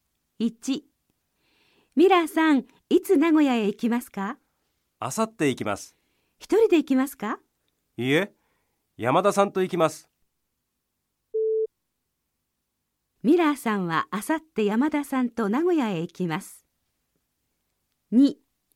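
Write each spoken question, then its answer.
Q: ミラーさんはあさって山田さんと名古屋へ行きます。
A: ○(正しい)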